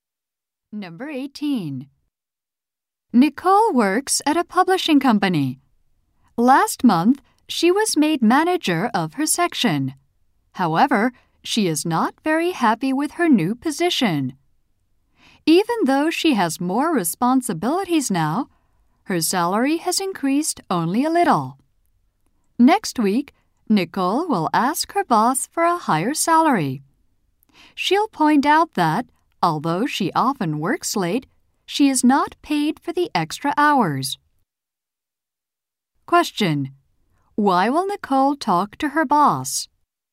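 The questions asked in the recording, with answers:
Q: Why will Nicole talk to her boss?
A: To ask for a higher salary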